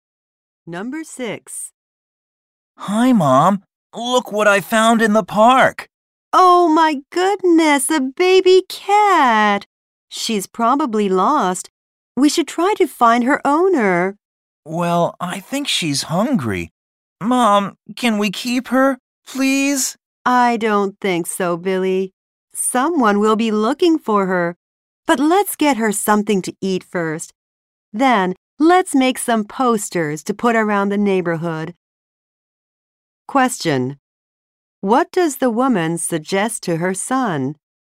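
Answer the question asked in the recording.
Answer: Feed the cat and make posters to find its owner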